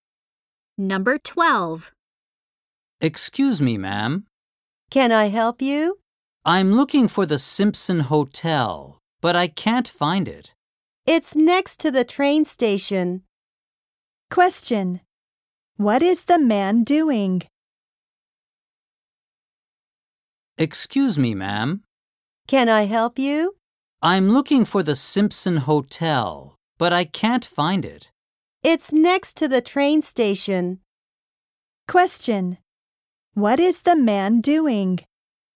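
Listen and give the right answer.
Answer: Looking for the Simpson Hotel.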